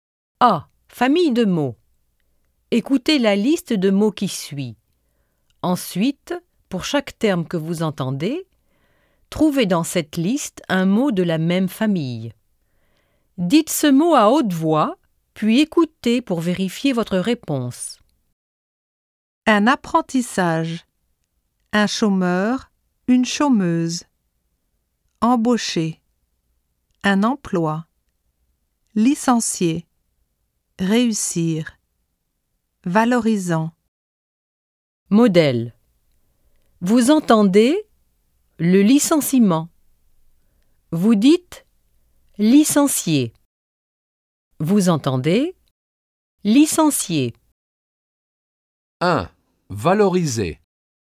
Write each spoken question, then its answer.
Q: Valoriser.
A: Valorisant.